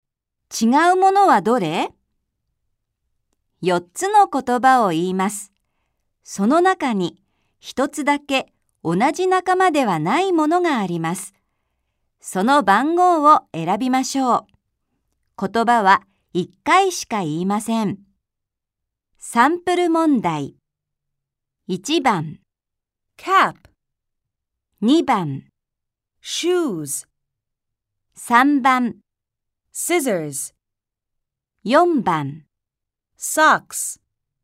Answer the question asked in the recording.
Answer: 3番が答えだとわかります